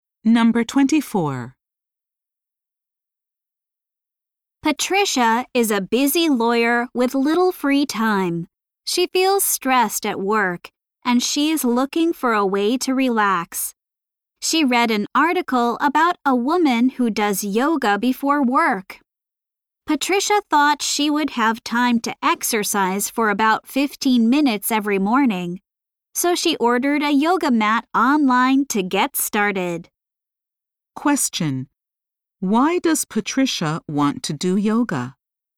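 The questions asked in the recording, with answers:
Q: Why does Patricia want to do yoga?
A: To relax because she feels stressed at work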